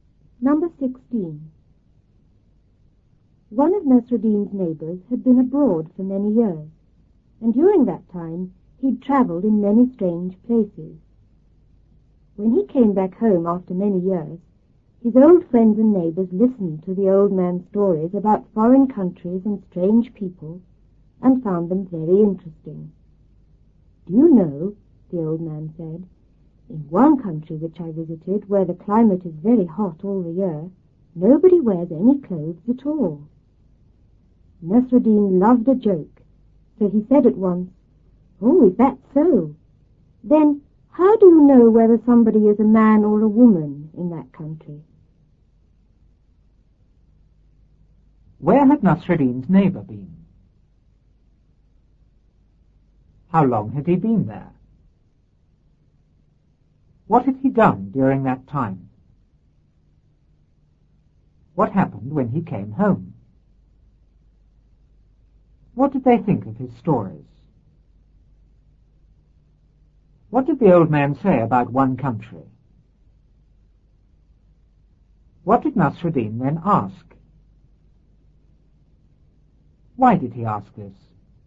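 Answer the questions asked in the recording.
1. Abroad
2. For many years
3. He had traveled in many strange places
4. His old friends and neighbors listened to his stories about foreign countries and strange people
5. They found them very interesting
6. It was very hot all year and nobody wore any clothes
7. How do you know whether somebody is a man or a woman in that country?
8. Because he loved a joke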